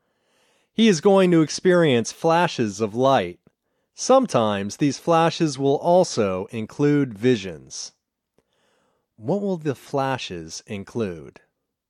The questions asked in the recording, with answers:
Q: What will the flashes include?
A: The flashes will include visions.